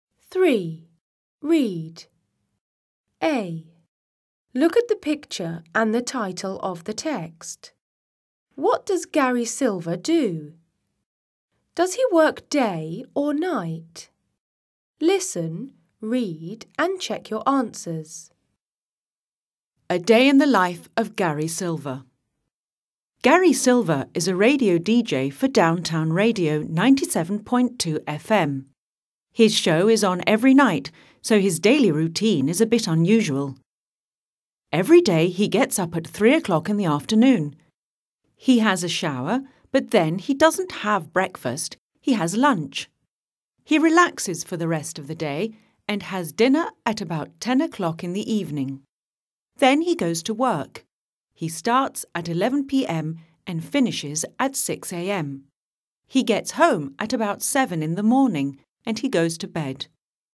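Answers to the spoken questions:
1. He is a radio DJ for Downtown Radio 97.2 FM.
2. Night (11 p.m. to 6 a.m.)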